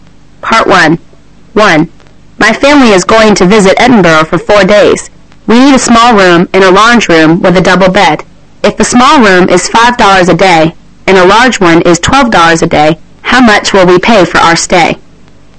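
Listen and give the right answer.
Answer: $68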